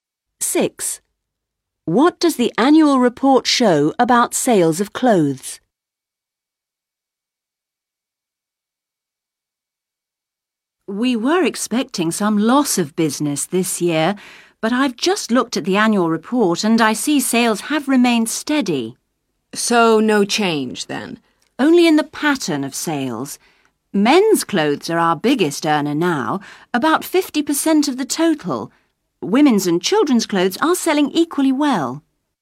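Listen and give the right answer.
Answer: Sales have remained steady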